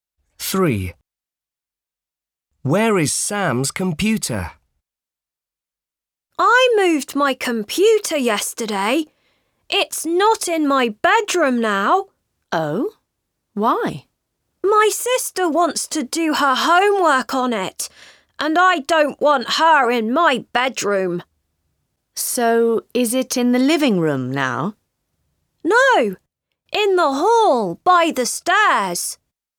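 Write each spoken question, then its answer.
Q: Where is Sam's computer?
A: in the hall by the stairs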